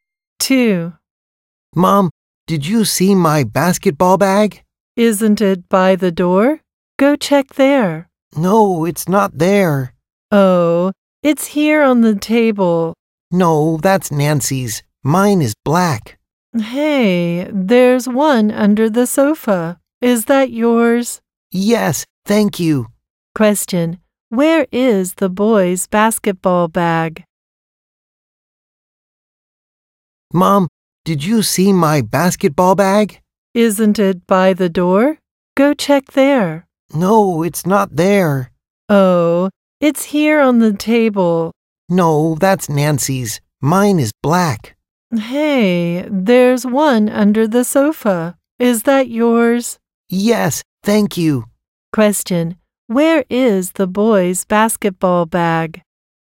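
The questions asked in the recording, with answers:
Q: where is the boy's basketball bag?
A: Under the sofa.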